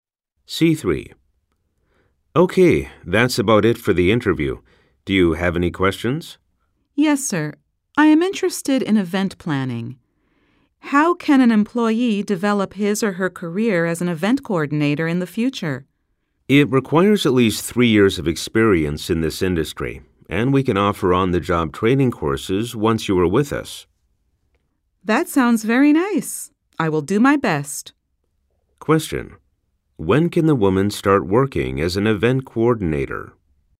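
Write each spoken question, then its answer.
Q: When can the woman start working as an event coordinator?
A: After she has at least 3 years of experience in the industry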